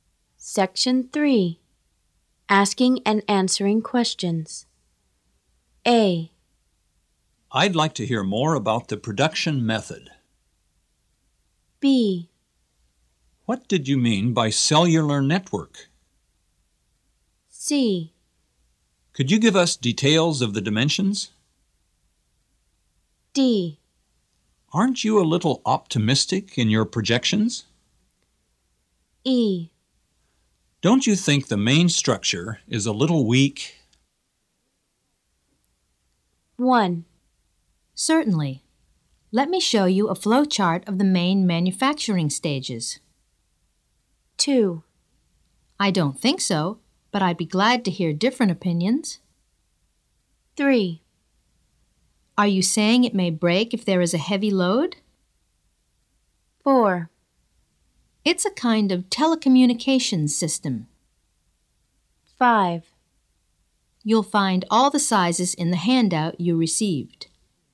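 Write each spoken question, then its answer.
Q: Certainly. Let me show you a flowchart of the main manufacturing stages.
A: A: I'd like to hear more about the production method.

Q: I don't think so, but I'd be glad to hear different opinions.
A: D: Aren't you a little optimistic in your projections?

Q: Are you saying it may break if there is a heavy load?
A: E: Don't you think the main structure is a little weak?

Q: It's a kind of telecommunications system.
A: B: What did you mean by cellular network?

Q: You'll find all the sizes in the handout you received.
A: C: Could you give us details of the dimensions?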